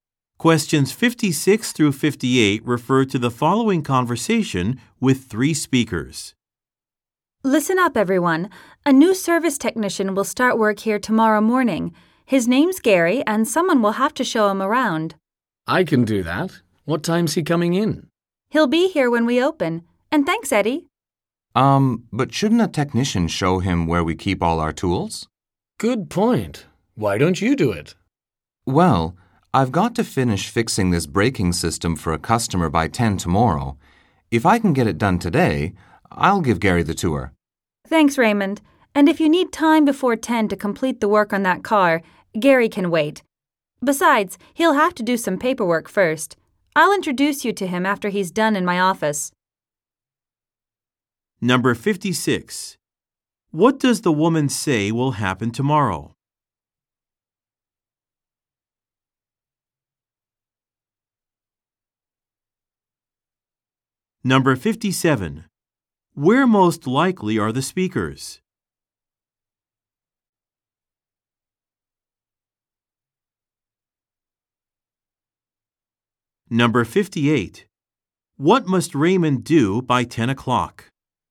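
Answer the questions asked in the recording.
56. A new service technician will start work
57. At a car repair shop
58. Finish fixing a braking system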